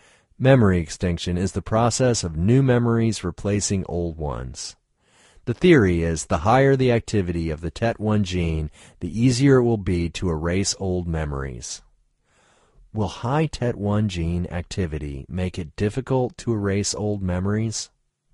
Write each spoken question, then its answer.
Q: Will high TET1 gene activity make it difficult to erase old memories?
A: No, high TET1 activity won't make it more difficult to erase old memories.